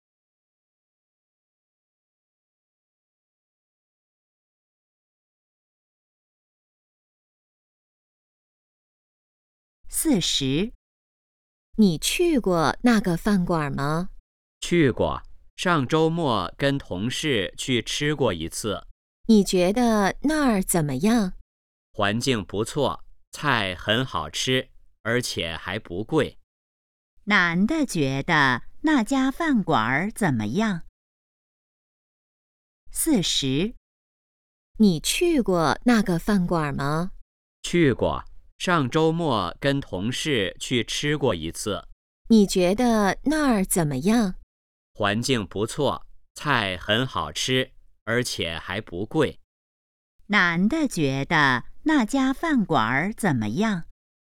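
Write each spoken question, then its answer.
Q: 男的觉得那家饭馆怎么样?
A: 环境不错,菜好吃,还不贵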